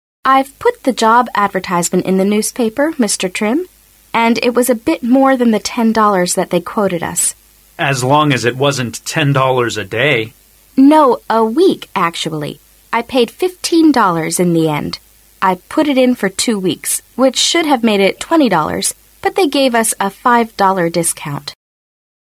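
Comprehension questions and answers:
How much did the job advertisement cost?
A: $15

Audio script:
W: I've put the job advertisement in the newspaper, Mr. Trim. And it was a bit more than $10 they quoted us.
M: As long as it was not $10 a day.
W: No, a week actually. I paid $15 in the end. I put it in for 2 weeks which should have made it $20, but they gave us a $5 discount.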